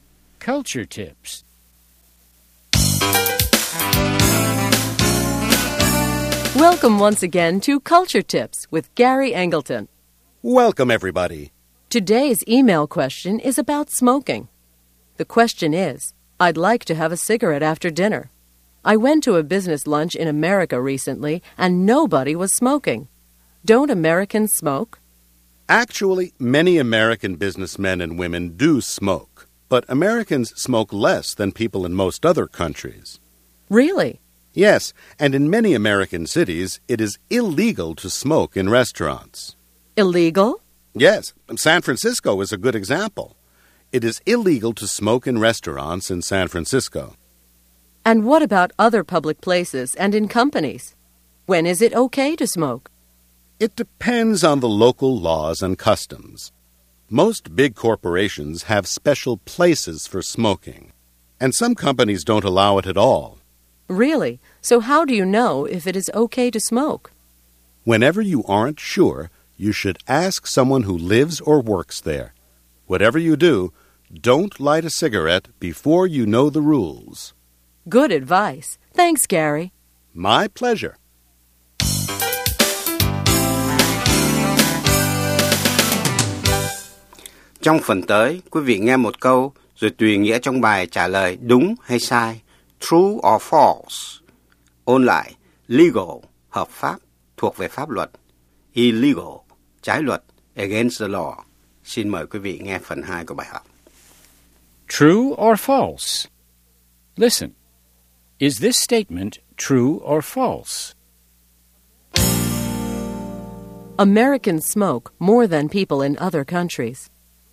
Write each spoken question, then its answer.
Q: Americans smoke more than people in other countries.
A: False. In America, people smoke less than in many other countries.